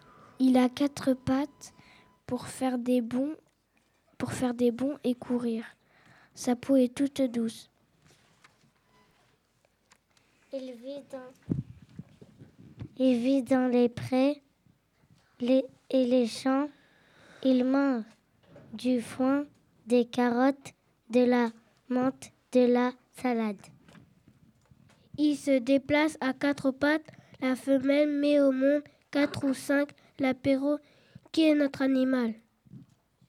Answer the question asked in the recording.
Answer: C'est le lapin.